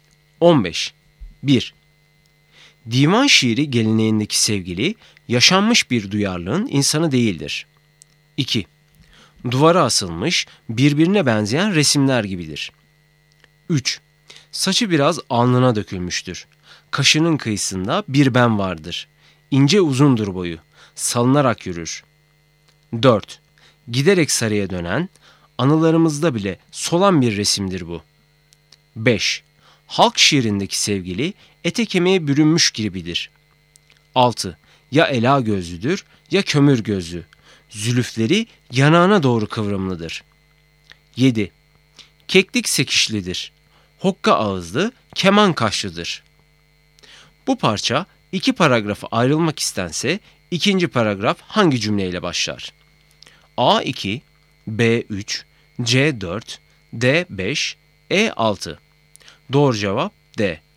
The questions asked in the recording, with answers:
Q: Bu parça iki paragrafı ayrılmak istense ikinci paragraf hangi cümleyle başlar?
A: Doğru cevap D.